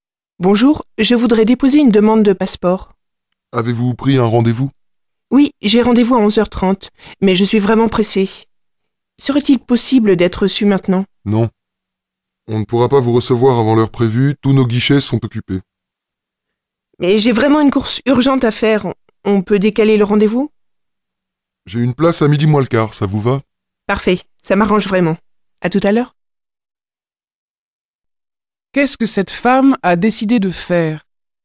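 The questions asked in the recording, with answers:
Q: Qu'est-ce que cette femme a décidé de faire?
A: Décaler son rendez-vous à midi moins le quart (11h45)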